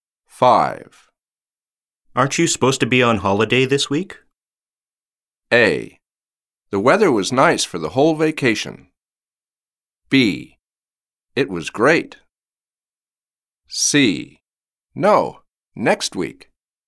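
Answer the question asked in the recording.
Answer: C: No, next week.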